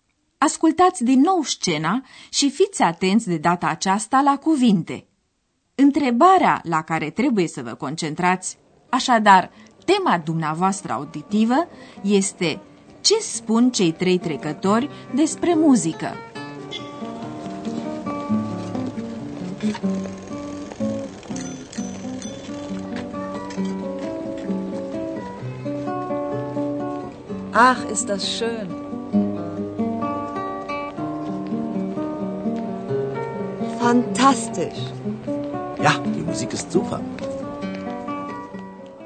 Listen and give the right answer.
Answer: Cei trei sunt entuziasmați de muzică.